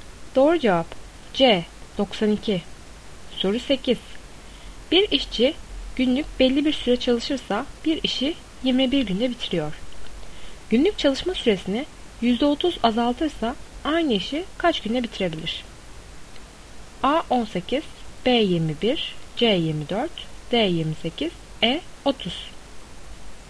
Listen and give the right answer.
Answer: Doğru cevap E 30.